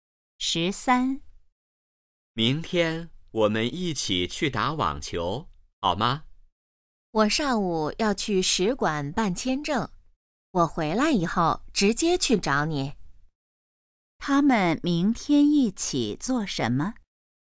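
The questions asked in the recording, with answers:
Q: 他们明天一起做什么?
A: 打网球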